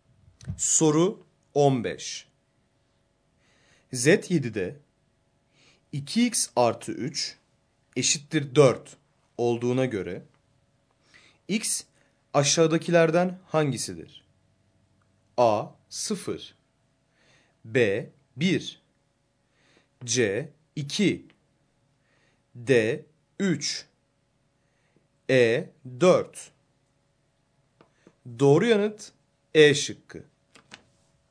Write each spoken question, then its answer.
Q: Z7'de 2x artı 3 eşittir 4 olduğuna göre x aşağıdakilerden hangisidir?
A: Doğru yanıt E şıkkı.